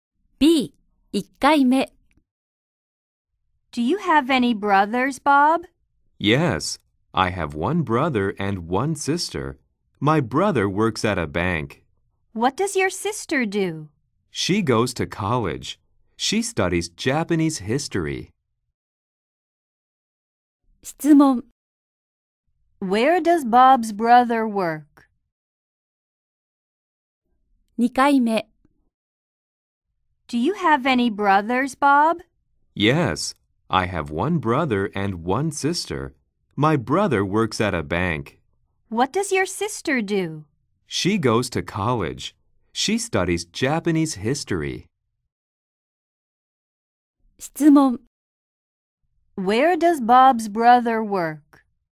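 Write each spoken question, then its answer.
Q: Where does Bob's brother work?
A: At a bank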